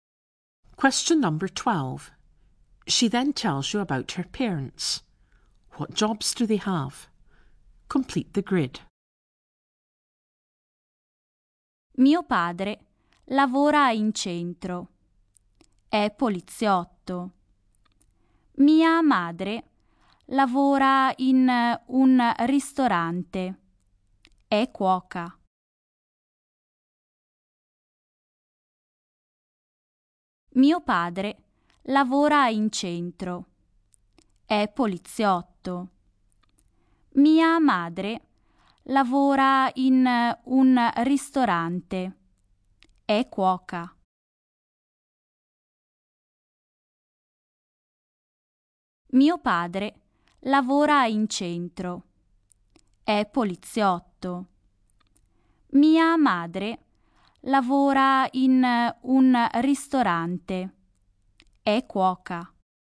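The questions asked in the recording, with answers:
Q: What jobs do they have?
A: Father is a policeman; mother is a cook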